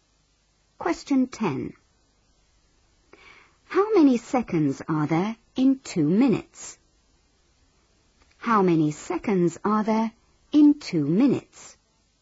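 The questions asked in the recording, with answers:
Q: How many seconds are there in 2 minutes?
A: 120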